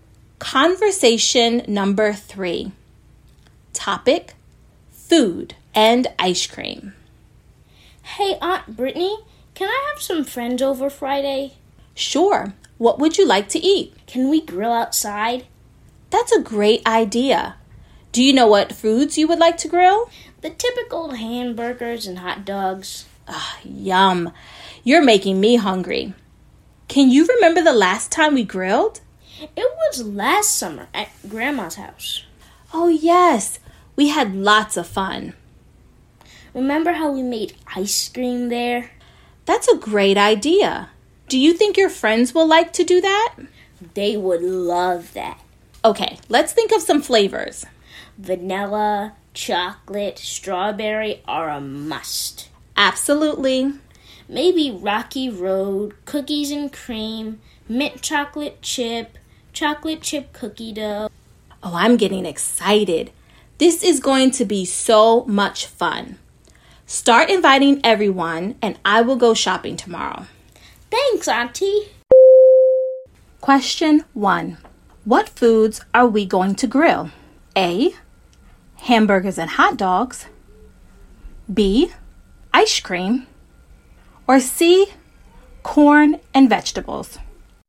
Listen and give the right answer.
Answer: If you said A. Hamburgers and hot dogs, you are correct.